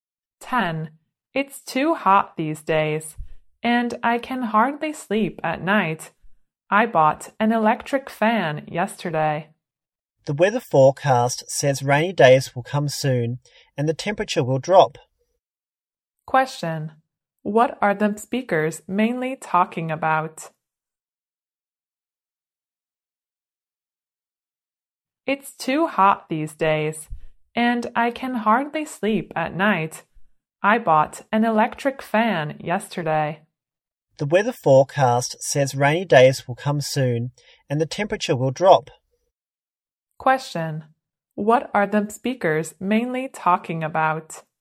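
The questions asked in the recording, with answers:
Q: What are the speakers mainly talking about?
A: The weather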